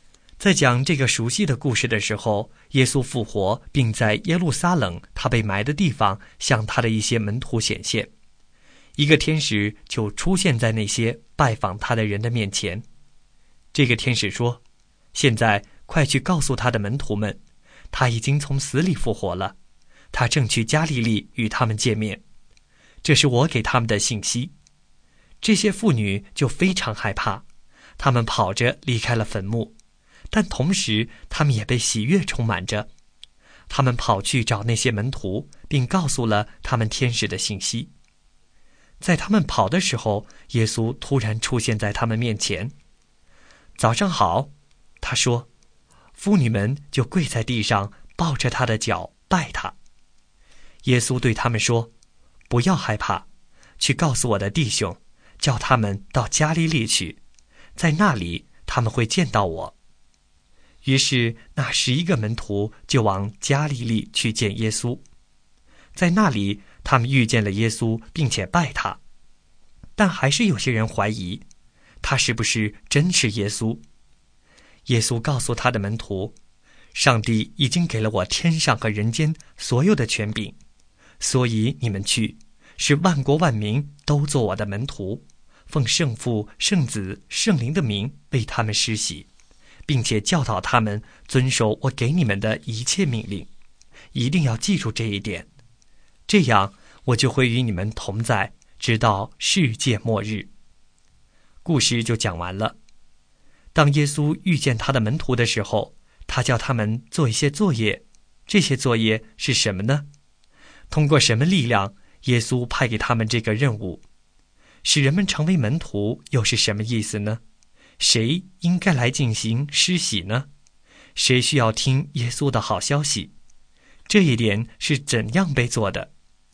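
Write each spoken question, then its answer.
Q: 当耶稣遇见他的门徒的时候,他叫他们做一些作业,这些作业是什么呢?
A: 使万国万民做他的门徒,奉圣父、圣子、圣灵的名为他们施洗,并教导他们遵守他的一切命令

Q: 通过什么力量耶稣派给他们这个任务?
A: 上帝给他的天上和人间所有的权柄

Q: 谁需要听耶稣的好消息?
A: 万国万民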